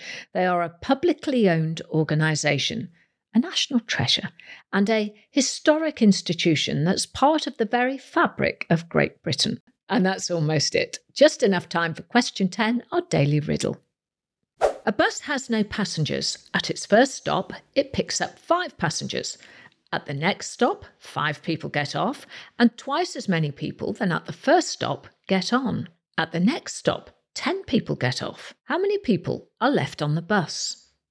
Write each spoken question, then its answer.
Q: How many people are left on the bus?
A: Well, the answer is actually one.